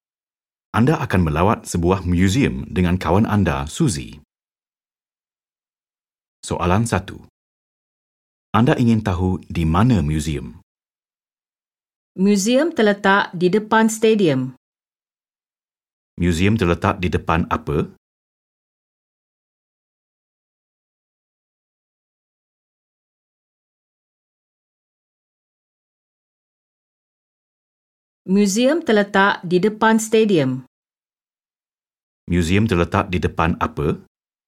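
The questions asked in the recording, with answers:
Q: Museum terletak di depan apa?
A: Stadium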